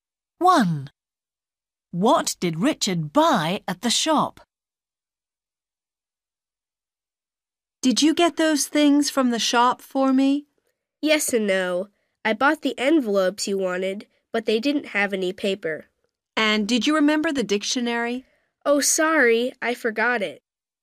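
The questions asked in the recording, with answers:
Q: What did Richard buy at the shop?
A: envelopes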